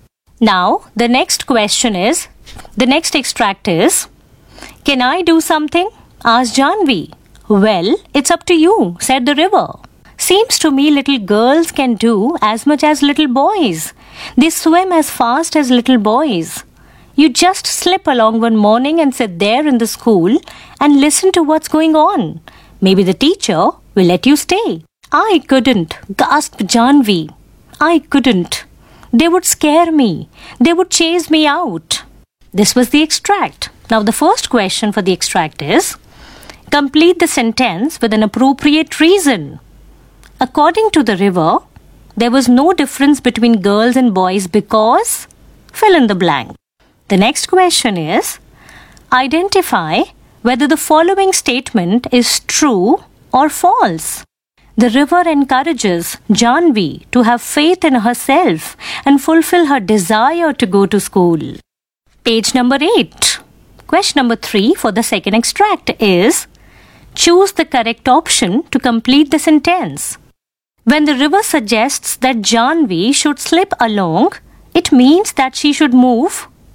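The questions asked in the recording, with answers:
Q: The river encourages Janvi to have faith in herself and fulfill her desire to go to school.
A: True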